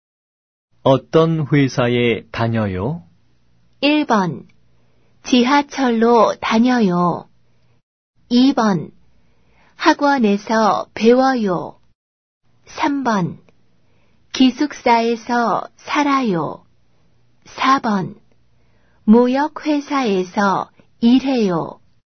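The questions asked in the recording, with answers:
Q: 어떤 회사에 다녀요?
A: 4: 무역회사에서 일해요.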